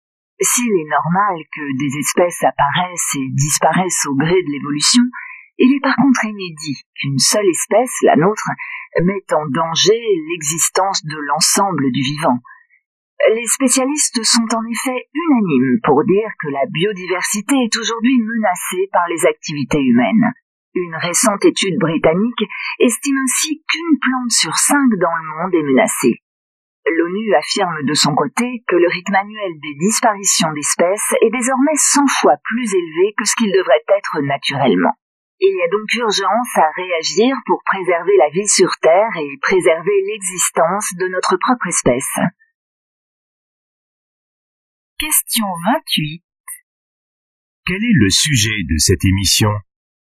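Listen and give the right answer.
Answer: La menace que les activités humaines font peser sur la biodiversité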